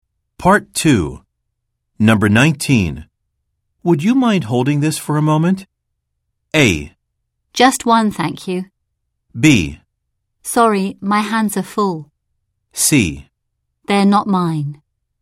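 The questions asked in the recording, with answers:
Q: Would you mind holding this for a moment?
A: B: Sorry, my hands are full.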